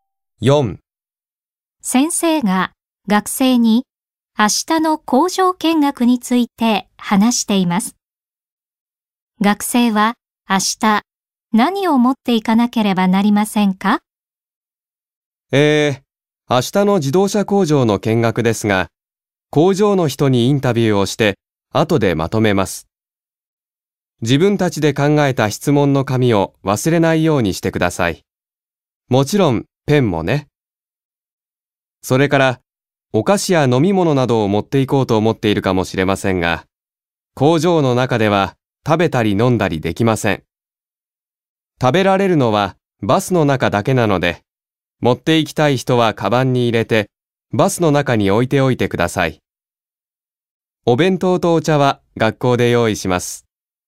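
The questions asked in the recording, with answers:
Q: 学生は明日何を持っていかなければなりませんか?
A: 自分たちで考えた質問の紙とペン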